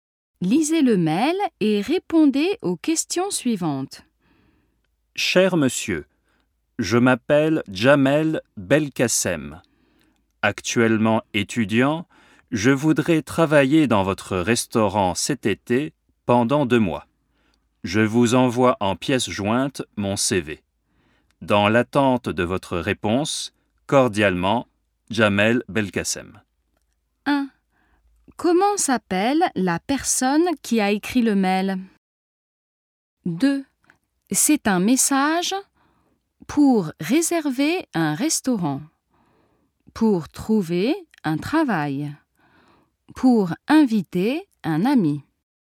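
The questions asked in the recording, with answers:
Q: Comment s'appelle la personne qui a écrit le mail?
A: Jamel Belkacem

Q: C'est un message pour réserver un restaurant, pour trouver un travail, pour inviter un ami.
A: pour trouver un travail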